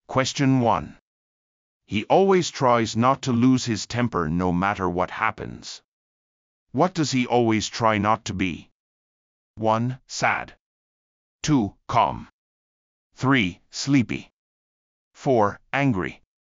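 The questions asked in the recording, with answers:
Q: What does he always try not to be?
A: 4: Angry.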